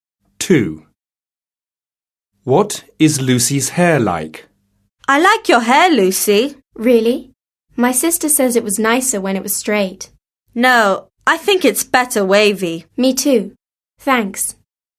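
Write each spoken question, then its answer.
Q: What is Lucy's hair like?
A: wavy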